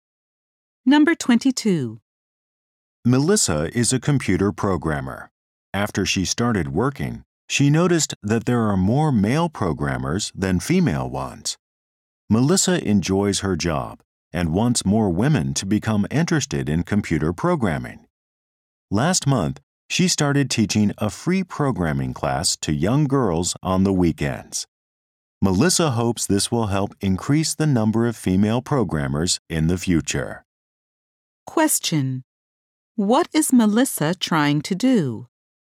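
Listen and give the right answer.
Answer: Get more women interested in computer programming.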